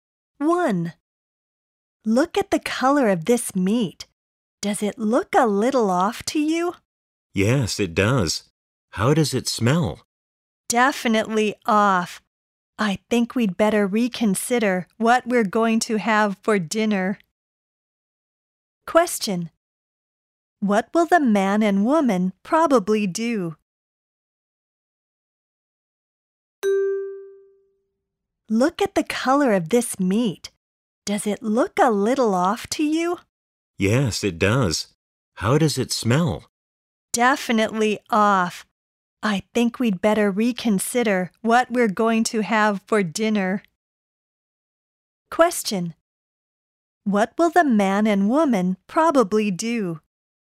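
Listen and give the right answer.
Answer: Have something else for dinner instead of the meat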